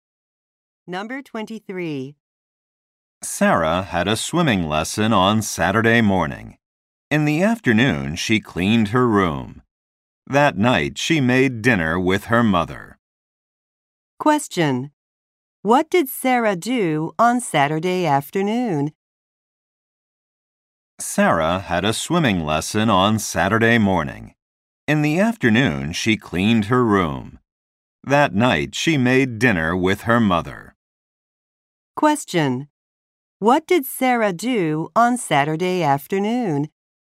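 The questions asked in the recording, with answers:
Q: What did Sarah do on Saturday afternoon?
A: She cleaned her room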